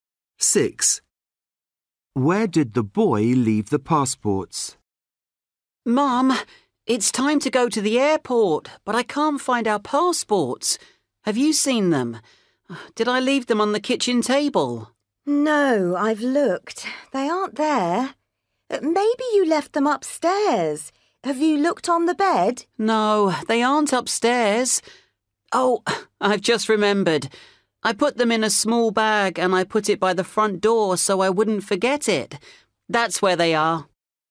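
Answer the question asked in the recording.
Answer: In a small bag by the front door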